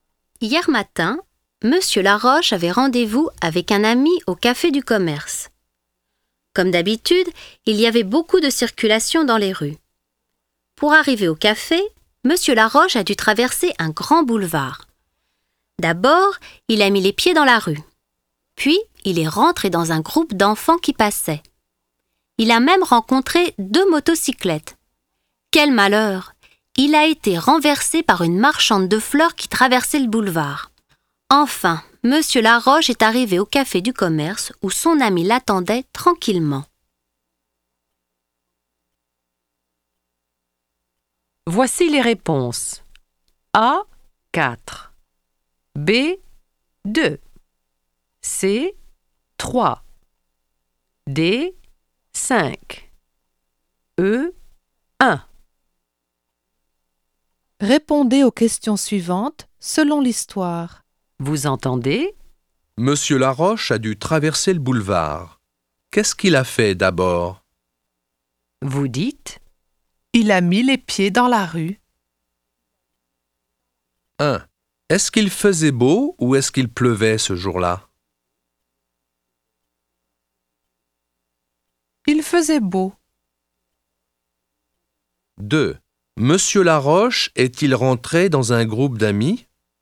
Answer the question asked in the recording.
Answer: Non, il est rentré dans un groupe d'enfants.